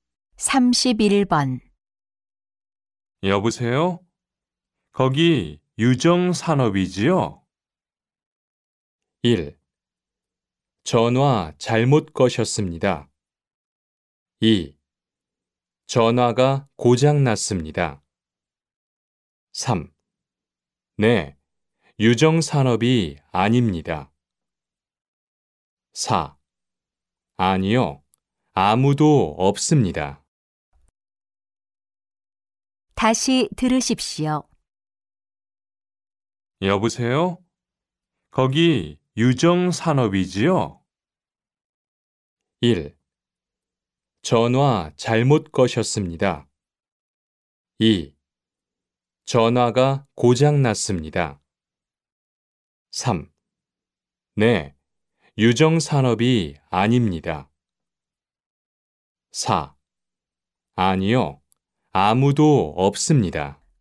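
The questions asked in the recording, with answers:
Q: 여보세요? 거기 유정산업이지요?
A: 1: 전화 잘못 거셨습니다.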